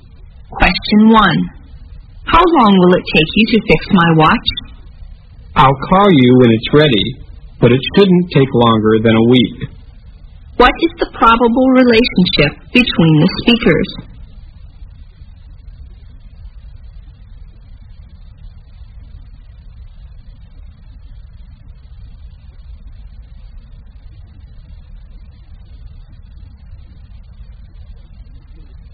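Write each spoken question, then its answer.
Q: What is the probable relationship between the speakers?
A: Customer and watch repairer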